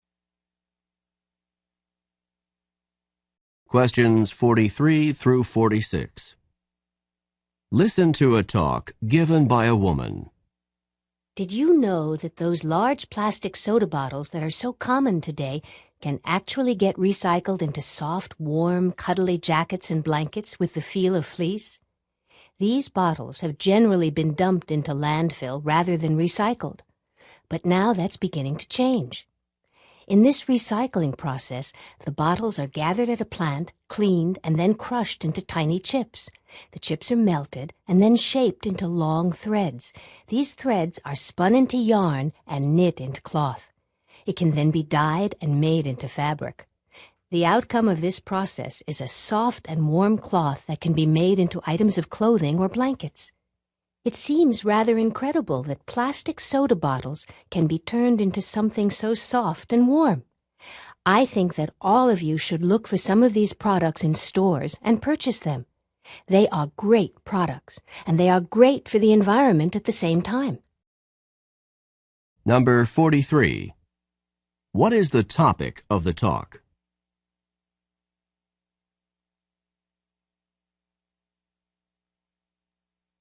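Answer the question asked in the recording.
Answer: Recycling plastic soda bottles into soft fabric for clothing and blankets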